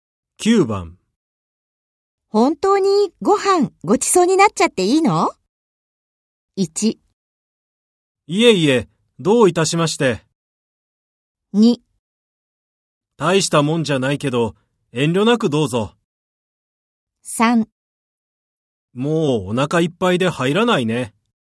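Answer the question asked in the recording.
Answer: 2: 大したもんじゃないけど、遠慮なくどうぞ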